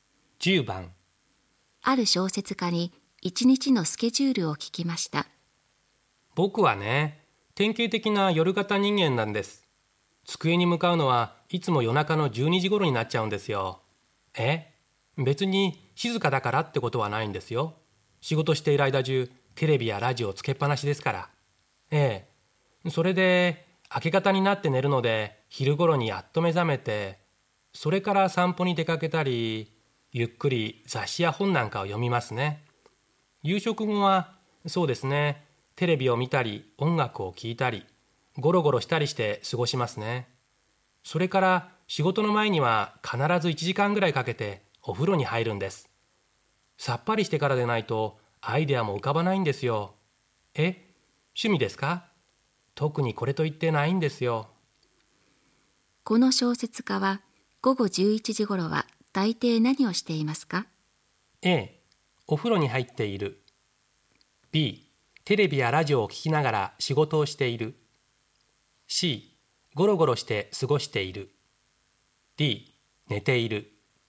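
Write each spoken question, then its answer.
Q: この小説家は午後11時頃は大抵何をしていますか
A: A: お風呂に入っている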